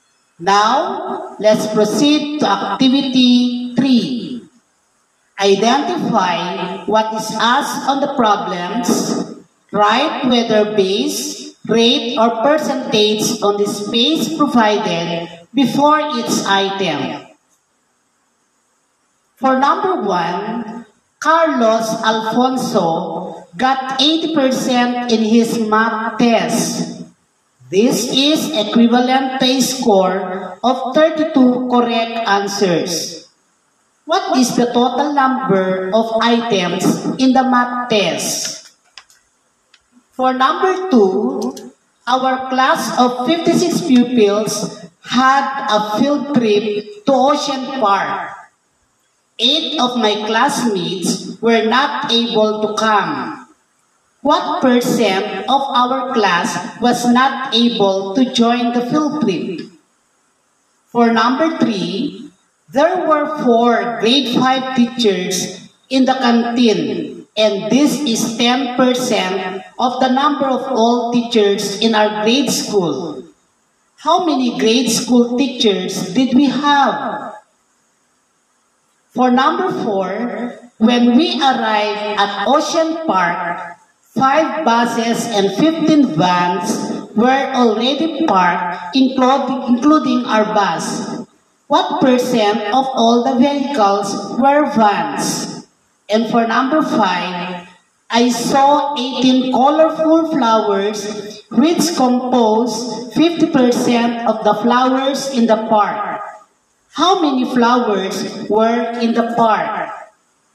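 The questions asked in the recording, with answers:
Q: What is the total number of items in the math test?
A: base

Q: What percent of our class was not able to join the field trip?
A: rate

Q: How many grade school teachers did we have?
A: base

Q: What percent of all the vehicles were vans?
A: rate

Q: How many flowers were in the park?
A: base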